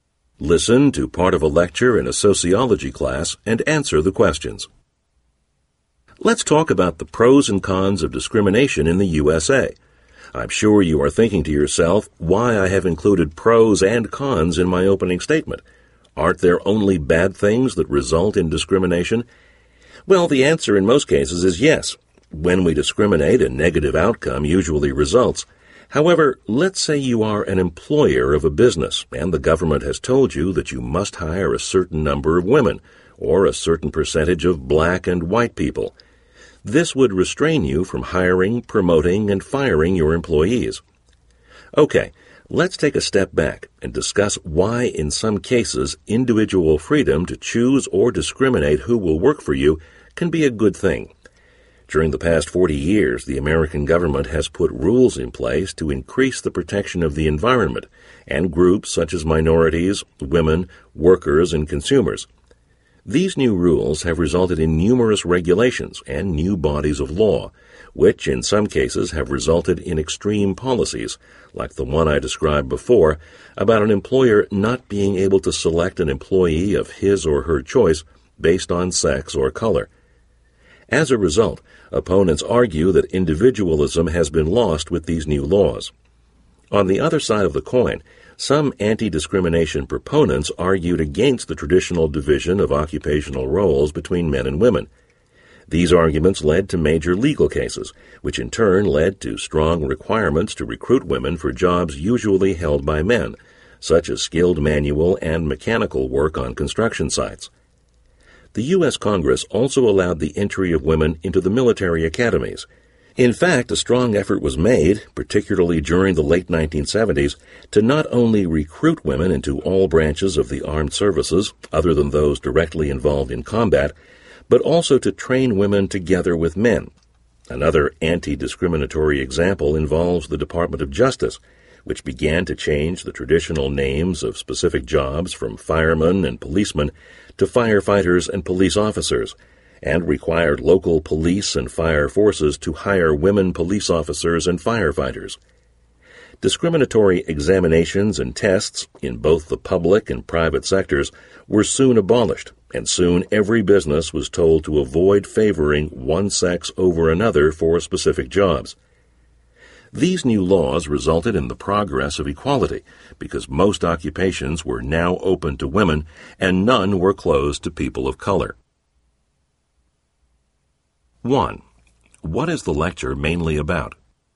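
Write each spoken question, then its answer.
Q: What is the lecture mainly about?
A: The pros and cons of discrimination and anti-discrimination laws in the USA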